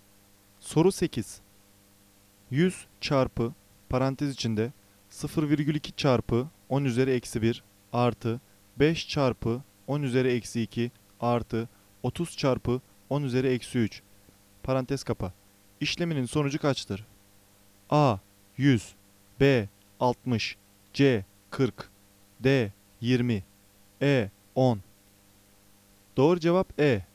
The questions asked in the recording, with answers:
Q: İşleminin sonucu kaçtır?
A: Doğru cevap E. 10.